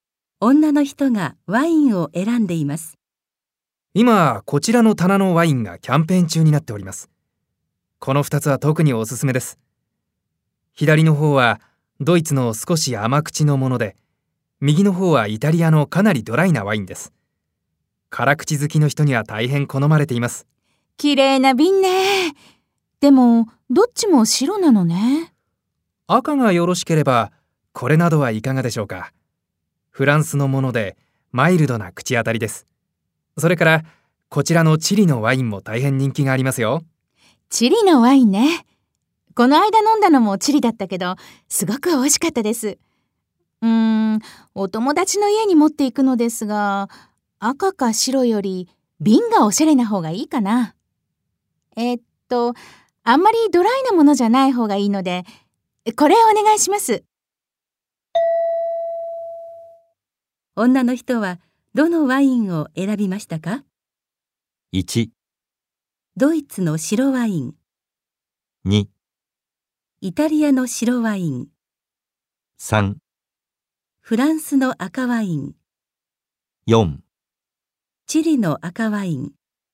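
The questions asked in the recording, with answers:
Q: 女の人はどのワインを選びましたか?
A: 1: ドイツの白ワイン。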